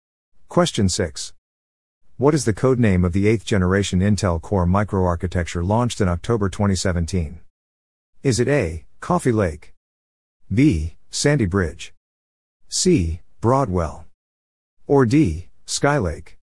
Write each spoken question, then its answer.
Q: What is the code name of the 8th generation Intel Core microarchitecture launched in October 2017?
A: The answer is A. Coffee Lake.